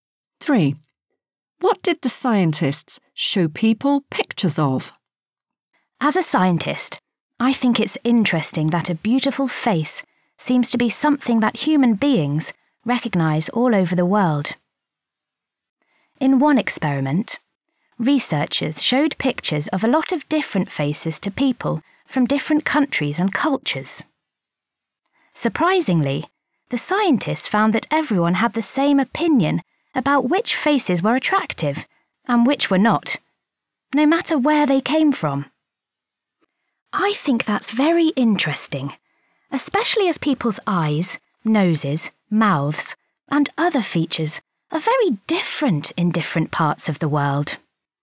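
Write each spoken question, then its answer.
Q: What did the scientists show people pictures of?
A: different faces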